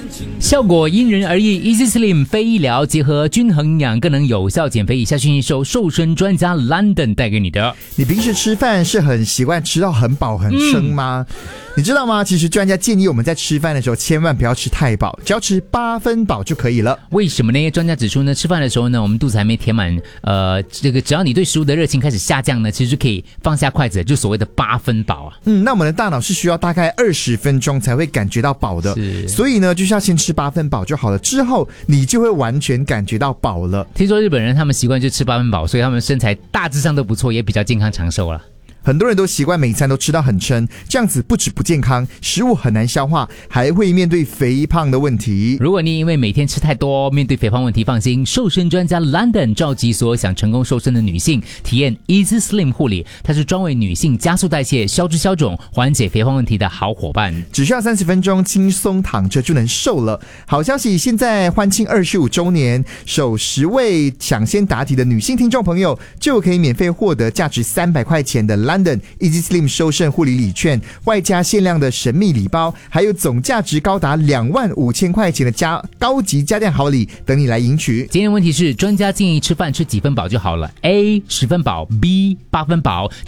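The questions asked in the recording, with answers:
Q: 今天问题是,专家建议吃饭吃几分饱就好了? A 10分饱, B 8分饱。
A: B: 8分饱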